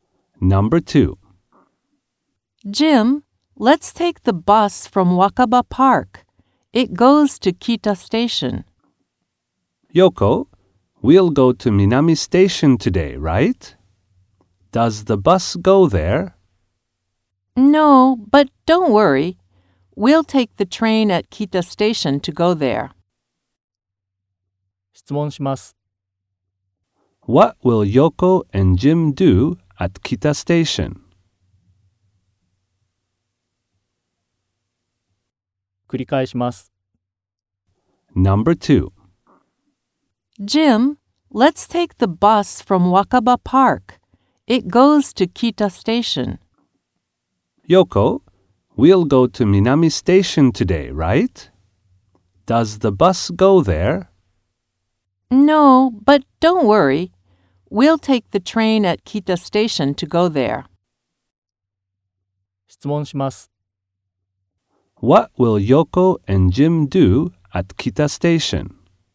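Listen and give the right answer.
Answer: They will take the train to Minami Station.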